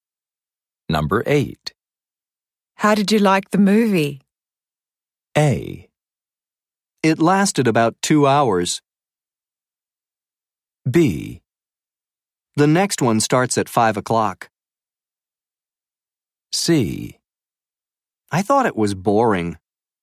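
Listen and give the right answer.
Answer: C: I thought it was boring.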